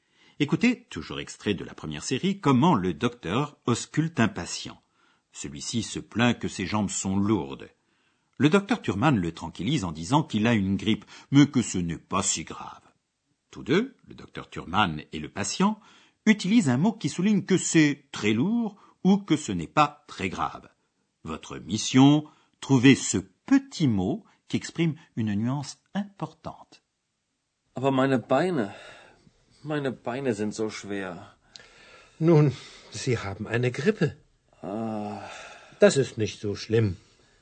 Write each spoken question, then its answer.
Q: Votre mission, trouver ce petit mot qui exprime une nuance importante.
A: Zo, si, si lourd, si grave.